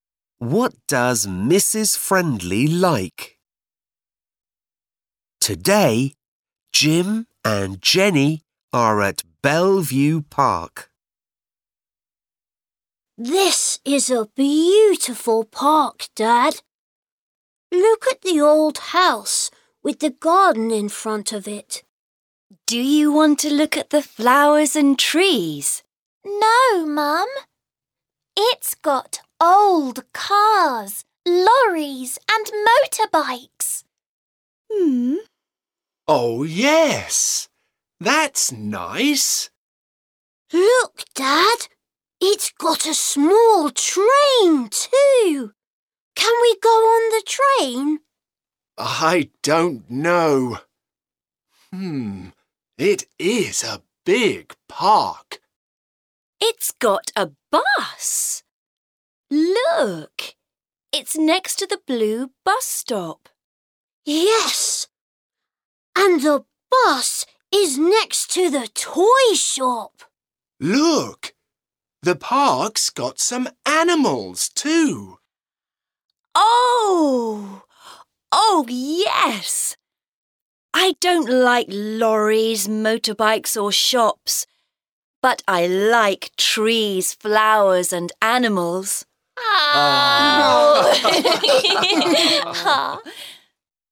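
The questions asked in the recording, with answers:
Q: What does Mrs. Friendly like?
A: Trees, flowers and animals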